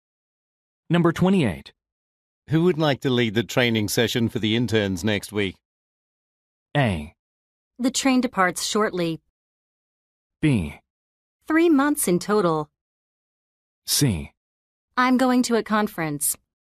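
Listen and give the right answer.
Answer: C: I'm going to a conference.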